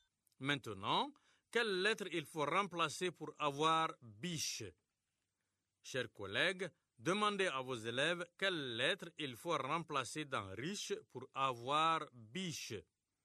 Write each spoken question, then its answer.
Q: Chers collègues, demandez à vos élèves quelle lettre il faut remplacer dans riche pour avoir biche.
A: Monsieur, c'est la lettre R.